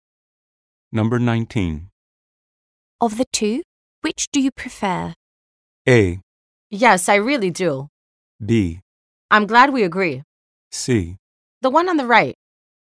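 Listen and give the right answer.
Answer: C: The one on the right.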